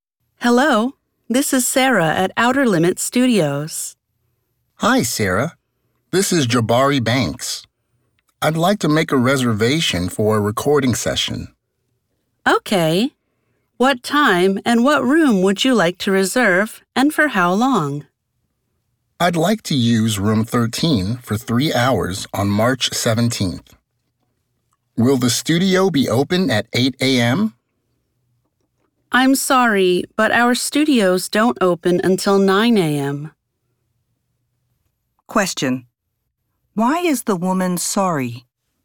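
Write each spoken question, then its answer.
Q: Why is the woman sorry?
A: The studios don't open until 9 a.m., so he can't start at 8 a.m.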